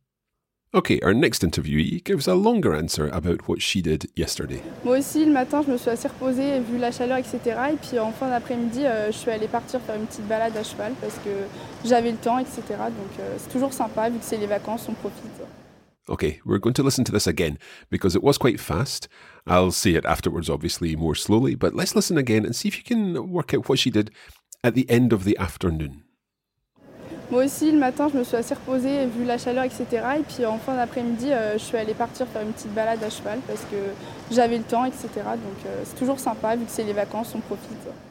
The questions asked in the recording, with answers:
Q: let's listen again and see if you can work out what she did at the end of the afternoon.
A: So I went out to go and do a little horse walk, a short horse ride, une petite balade à cheval.